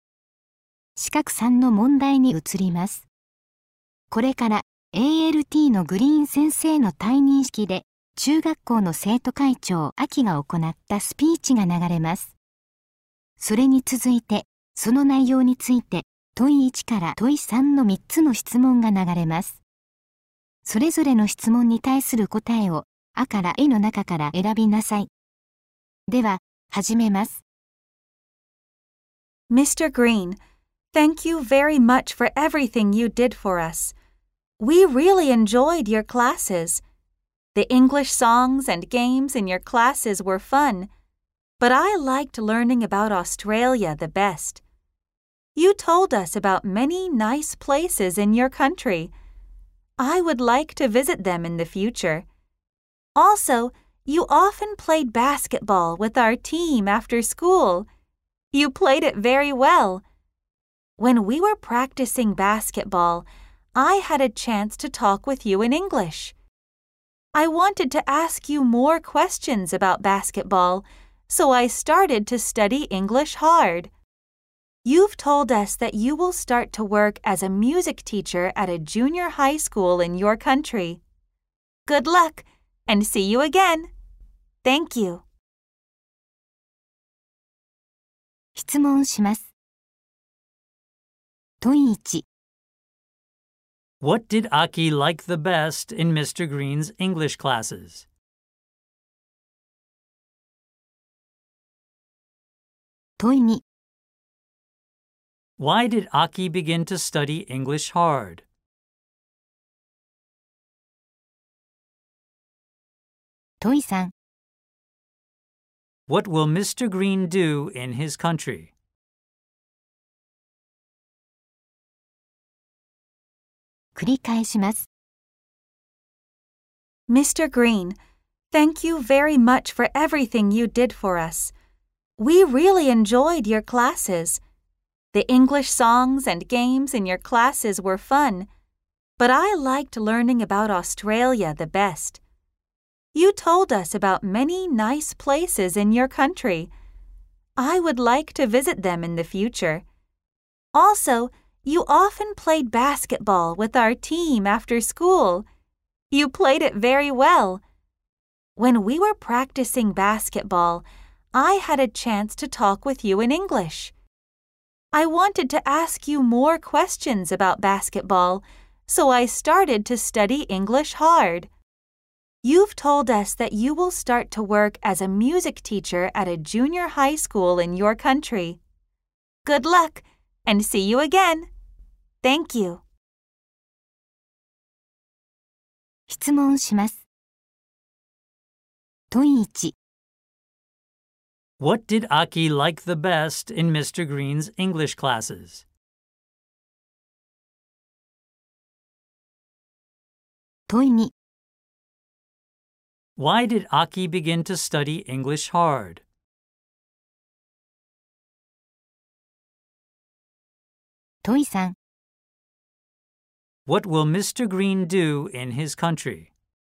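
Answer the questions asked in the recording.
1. Learning about Australia
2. She wanted to ask Mr. Green more questions about basketball
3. Work as a music teacher at a junior high school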